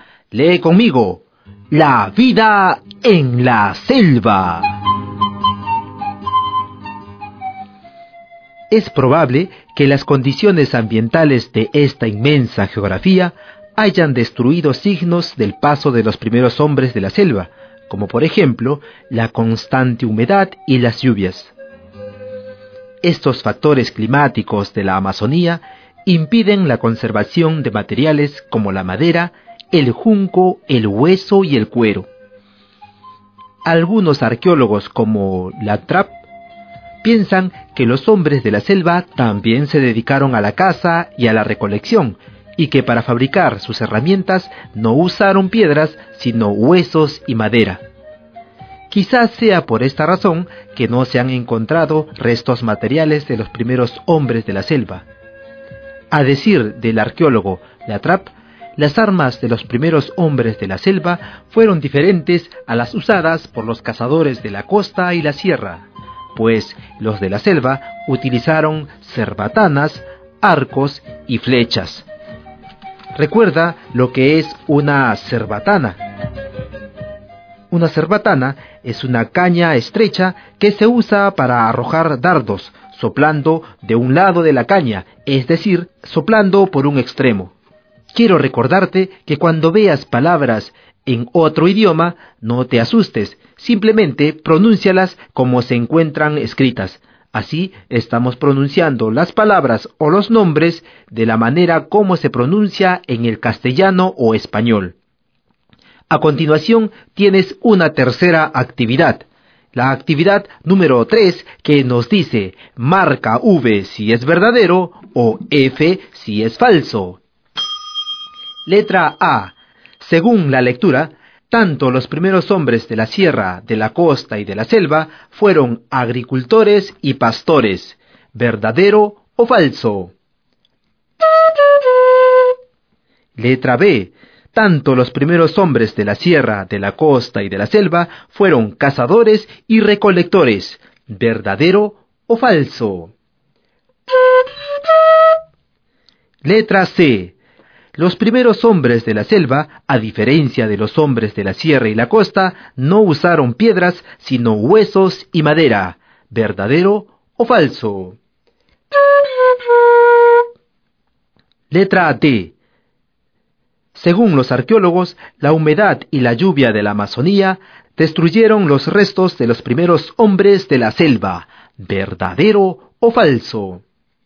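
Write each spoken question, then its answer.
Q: Letra A. Según la lectura, tanto los primeros hombres de la sierra, de la costa y de la selva fueron agricultores y pastores.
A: Falso

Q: Letra B. Tanto los primeros hombres de la sierra, de la costa y de la selva fueron cazadores y recolectores.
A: Verdadero

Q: Letra C. Los primeros hombres de la selva, a diferencia de los hombres de la sierra y la costa, no usaron piedras, sino huesos y madera.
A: Verdadero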